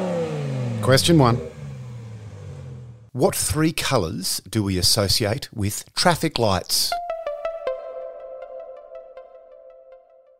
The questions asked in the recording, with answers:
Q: What three colours do we associate with traffic lights?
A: Green, orange, and red.